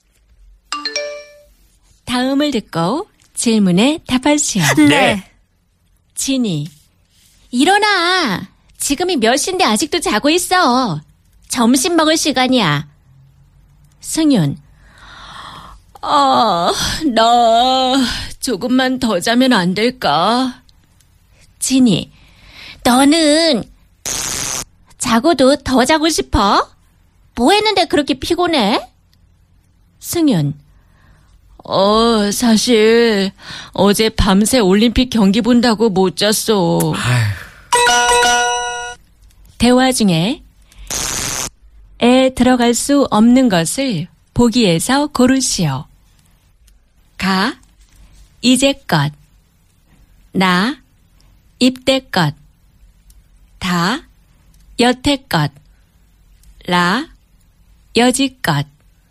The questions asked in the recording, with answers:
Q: 대화 중에 에 들어갈 수 없는 것을 보기에서 고르시오.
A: And so the wrong answer was